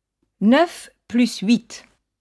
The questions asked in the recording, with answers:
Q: 9 plus 8.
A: Ça fait 17.